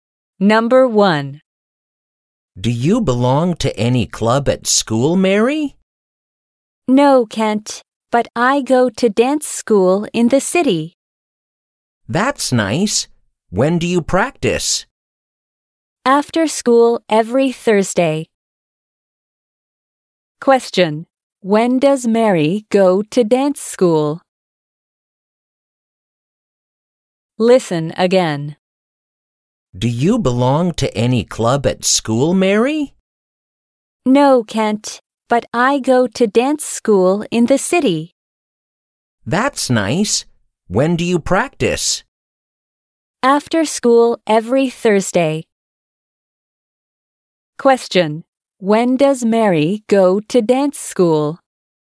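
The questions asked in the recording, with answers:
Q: When does Mary go to dance school?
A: After school every Thursday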